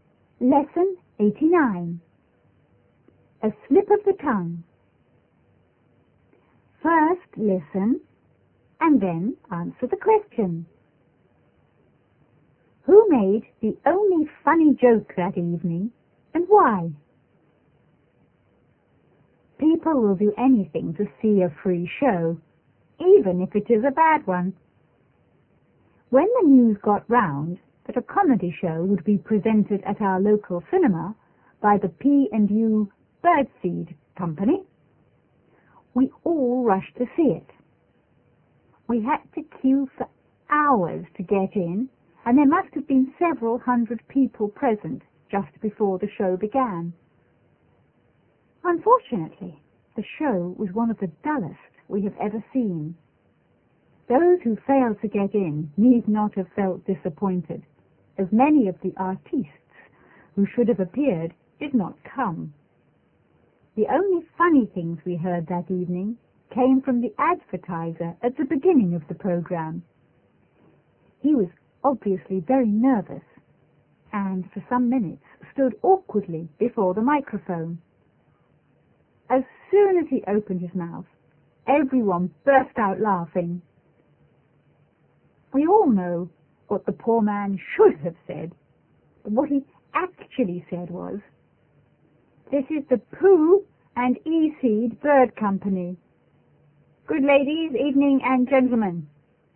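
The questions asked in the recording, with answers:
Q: Who made the only funny joke that evening and why?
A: The advertiser (announcer) at the start of the programme, because he was nervous and mixed up his words.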